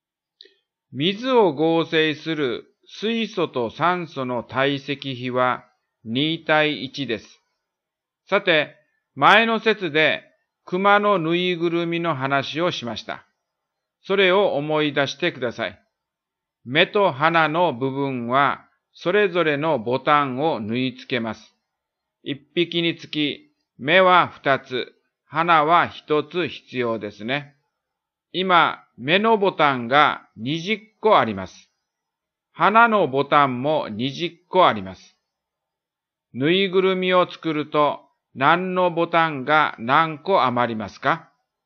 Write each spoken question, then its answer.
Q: ぬいぐるみを作ると何のボタンが何個余りますか?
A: 花のボタンは 20-10 で10個余るということになります。